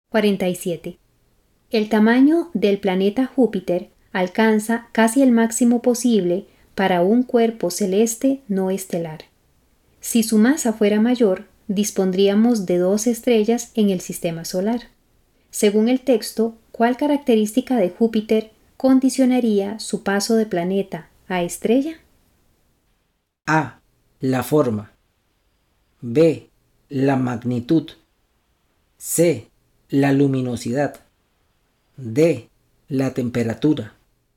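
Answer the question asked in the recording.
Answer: B: La magnitud.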